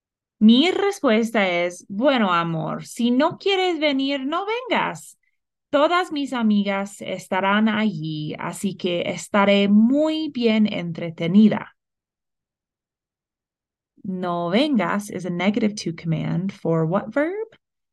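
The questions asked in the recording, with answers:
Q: No vengas is a negative to command for what verb?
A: venir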